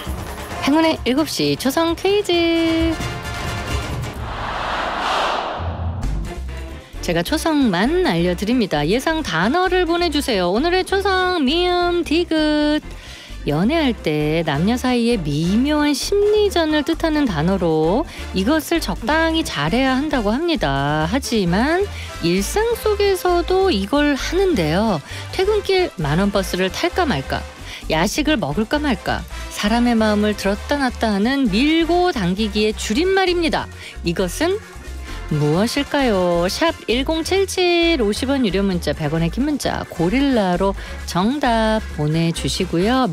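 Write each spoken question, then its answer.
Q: 이것은 무엇일까요?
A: 밀당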